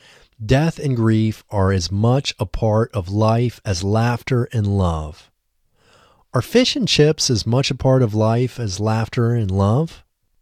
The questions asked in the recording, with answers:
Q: Are fish and chips as much a part of life as laughter and love?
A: No, fish and chips are not as much a part of life as laughter and love.